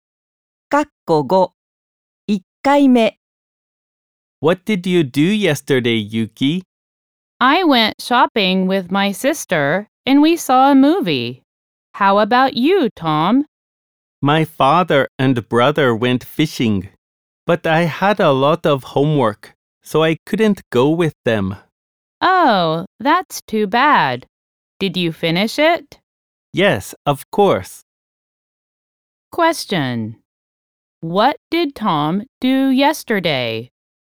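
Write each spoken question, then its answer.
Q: What did Tom do yesterday?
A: He did his homework.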